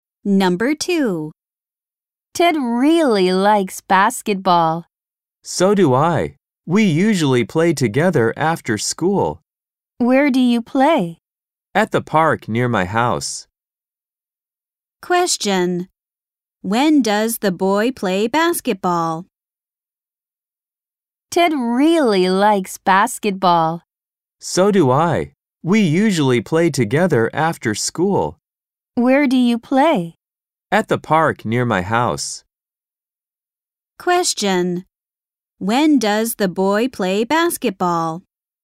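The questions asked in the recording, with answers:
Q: When does the boy play basketball?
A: After school.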